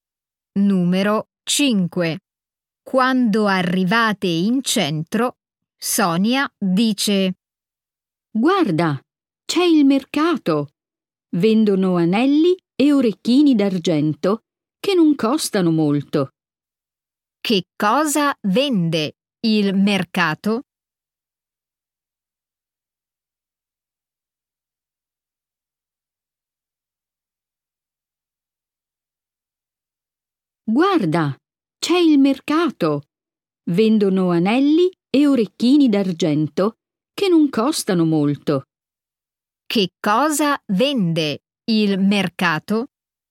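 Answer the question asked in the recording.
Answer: anelli e orecchini d'argento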